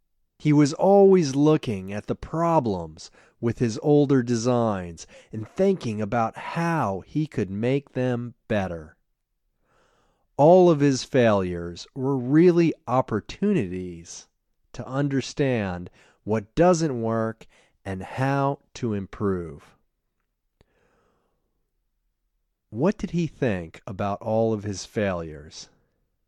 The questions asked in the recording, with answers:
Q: What did he think about all of his failures?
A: He thought all of his failures were really opportunities to understand what doesn't work and how to improve.